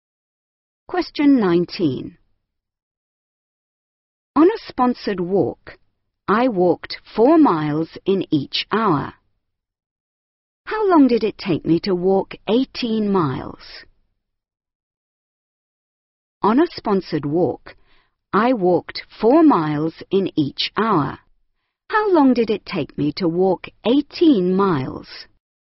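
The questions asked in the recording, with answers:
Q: How long did it take me to walk 18 miles?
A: 4.5 hours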